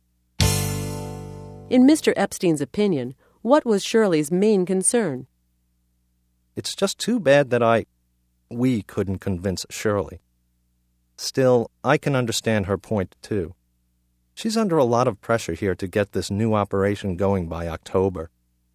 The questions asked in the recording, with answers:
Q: In Mr. Epstein's opinion, what was Shirley's main concern?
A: He felt that her main concern was the October deadline.